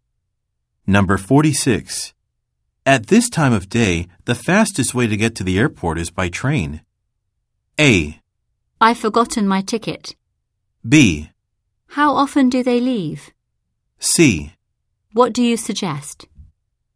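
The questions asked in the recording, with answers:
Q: At this time of day, the fastest way to get to the airport is by train.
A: B: How often do they leave?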